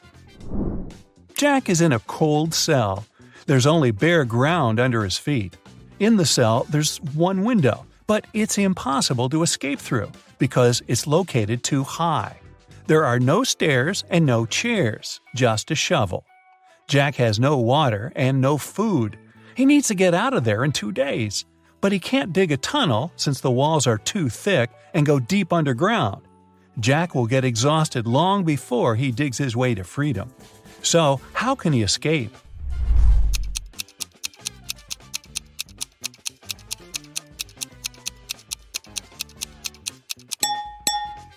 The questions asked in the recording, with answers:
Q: So, how can he escape?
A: He needs to dig a large hole in the ground and use the dirt to make a small hill.